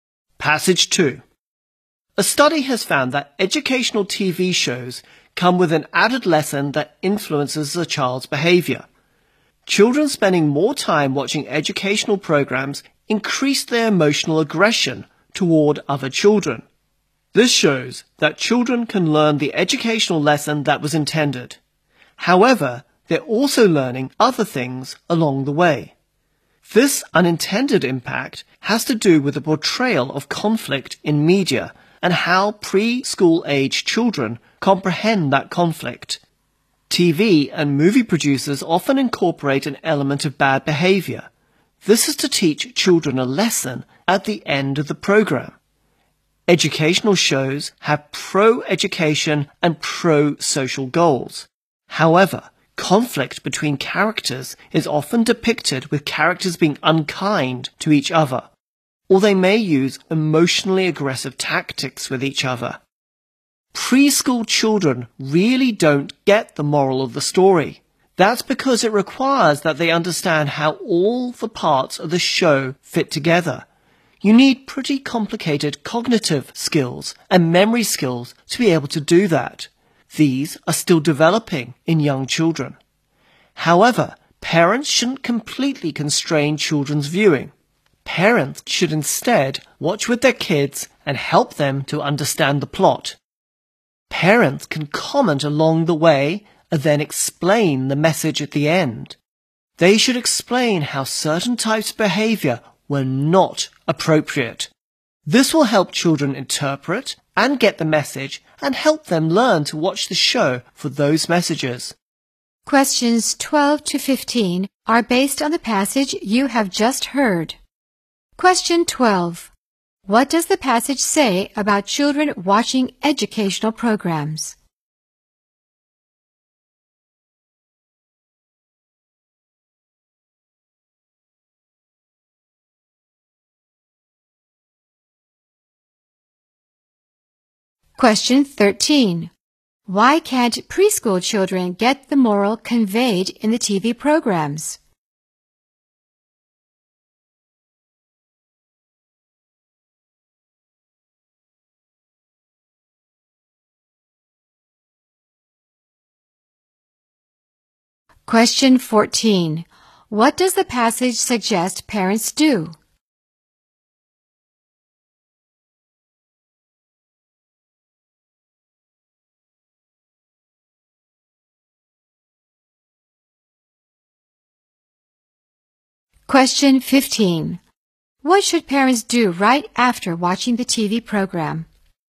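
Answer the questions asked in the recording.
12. It increases their emotional aggression toward other children
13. It needs complicated cognitive and memory skills that are still developing
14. Watch with their kids and help them understand the plot
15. Explain the message, including which behavior was not appropriate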